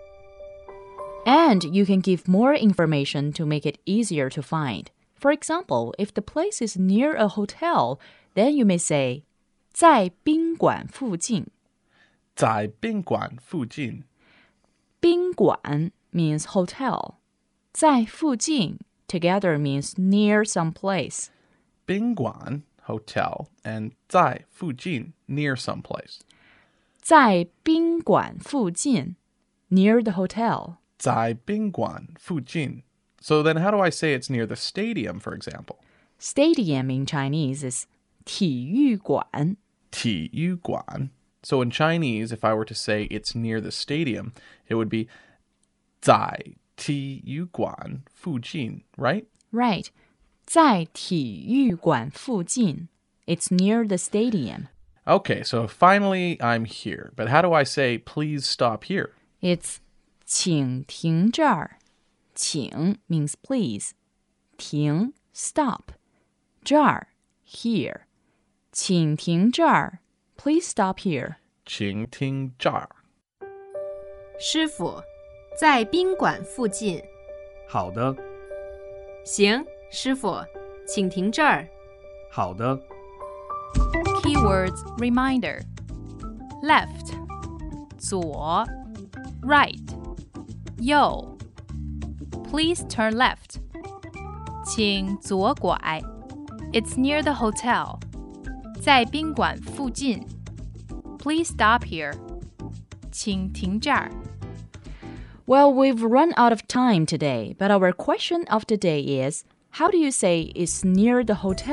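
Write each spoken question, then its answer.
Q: how do you say it's near the hotel in Chinese?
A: 在宾馆附近 (zài bīnguǎn fùjìn)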